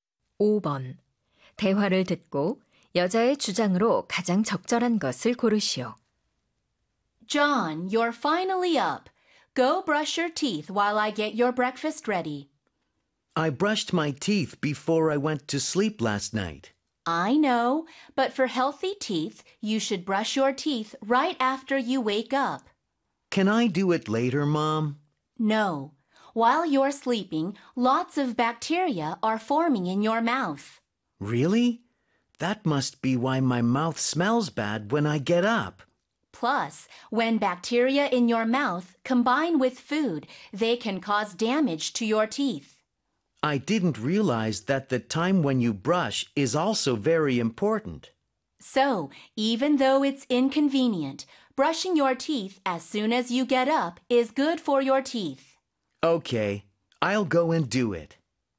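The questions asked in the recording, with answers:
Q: 대화를 듣고 여자의 주장으로 가장 적절한 것을 고르시오.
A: 일어나자마자 바로 양치질을 해야 한다.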